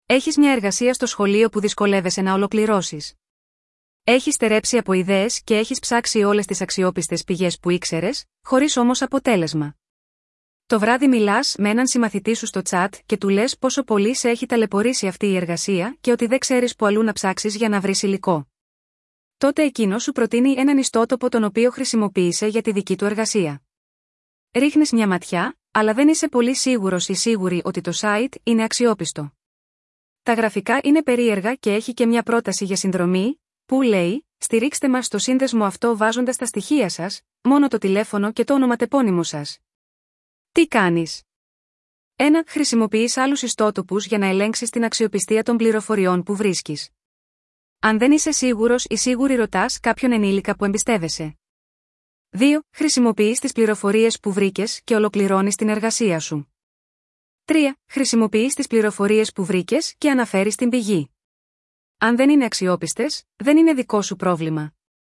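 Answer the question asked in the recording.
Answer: 1: Χρησιμοποιείς άλλους ιστότοπους για να ελέγξεις την αξιοπιστία των πληροφοριών που βρίσκεις. Αν δεν είσαι σίγουρος ή σίγουρη ρωτάς κάποιον ενήλικα που εμπιστεύεσαι.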